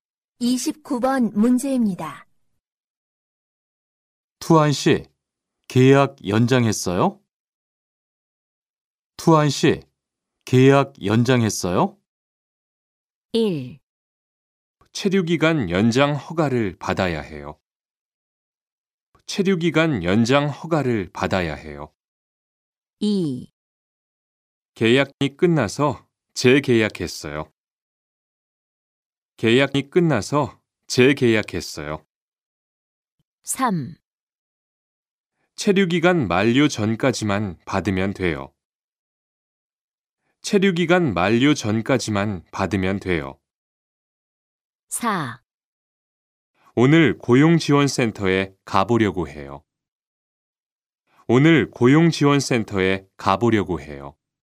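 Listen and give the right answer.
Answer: 2: 계약이 끝나서 재계약했어요.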